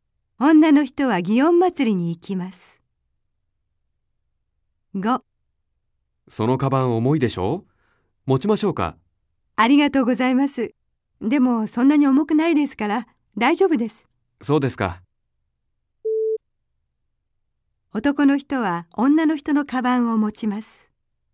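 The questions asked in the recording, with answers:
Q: 男の人は女の人のカバンを持ちます。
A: いいえ(×)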